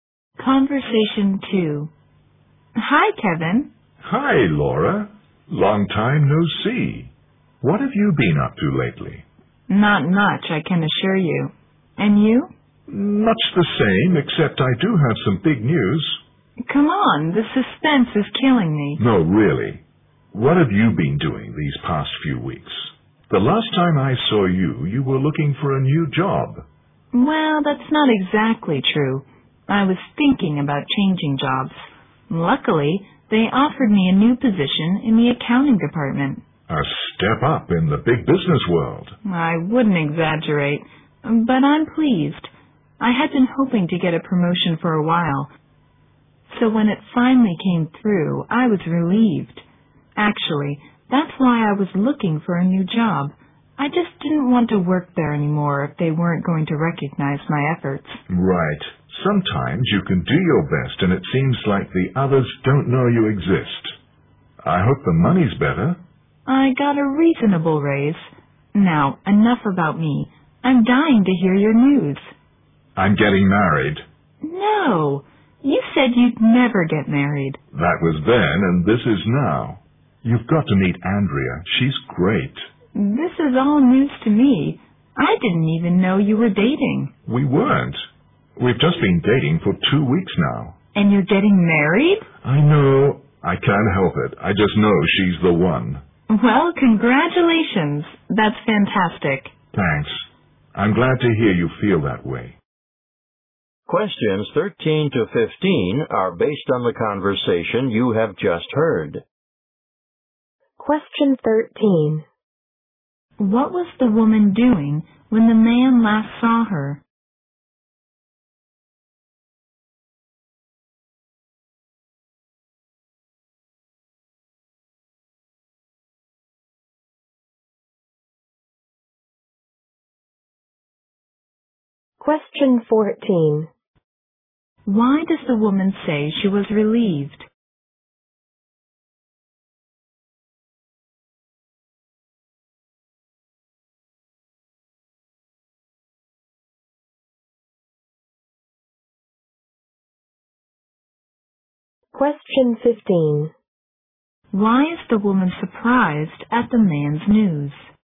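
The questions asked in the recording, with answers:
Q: What was the woman doing when the man last saw her?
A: Thinking about changing jobs.

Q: Why does the woman say she was relieved?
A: She finally got the promotion she had hoped for.

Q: Why is the woman surprised at the man's news?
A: He had said he would never get married, and he has only been dating for two weeks.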